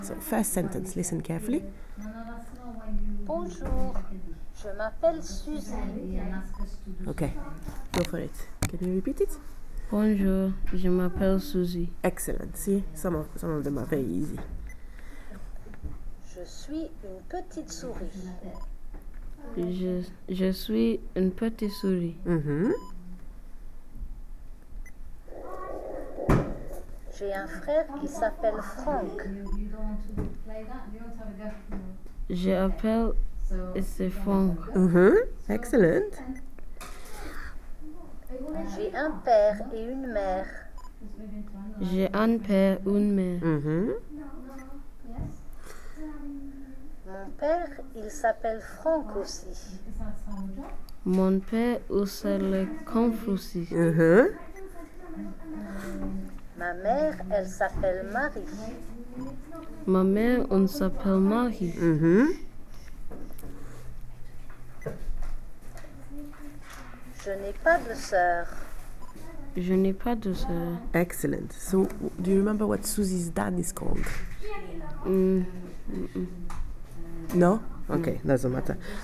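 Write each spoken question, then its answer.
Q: So, do you remember what Susie's dad is called?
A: Franck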